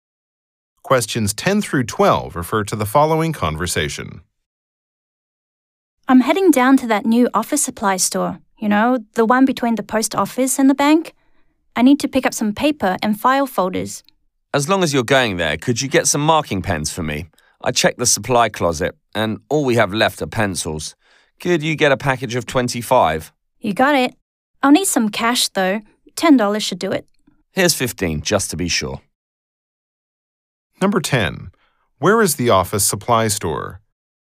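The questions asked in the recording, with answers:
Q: Where is the office supply store?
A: Between the post office and the bank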